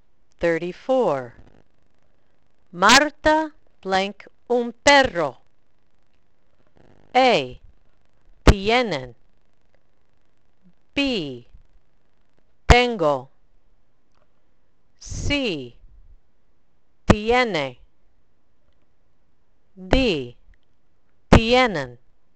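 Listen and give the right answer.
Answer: C: Tiene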